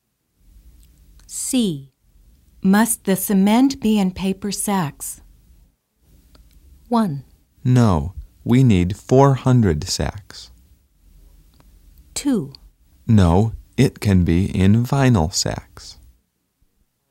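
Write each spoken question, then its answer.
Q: Must the cement be in paper sacks?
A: 2: No, it can be in vinyl sacks.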